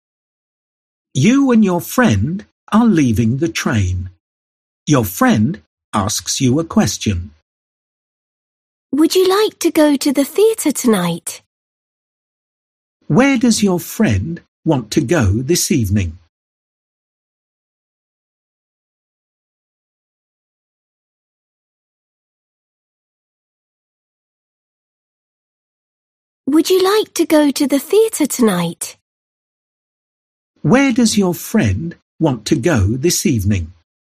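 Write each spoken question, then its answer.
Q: Where does your friend want to go this evening?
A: To the theatre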